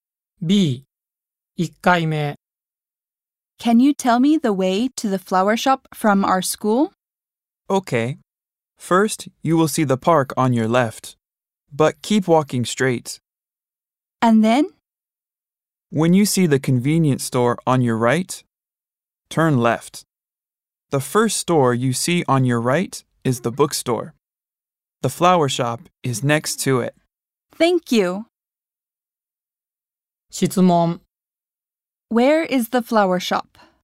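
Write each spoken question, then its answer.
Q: Where is the flower shop?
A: Next to the bookstore, after turning left at the convenience store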